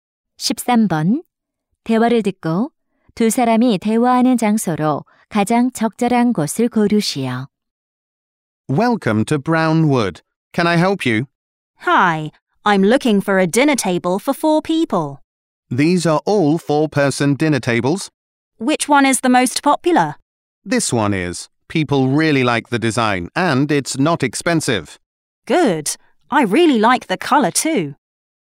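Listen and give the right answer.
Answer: 가구점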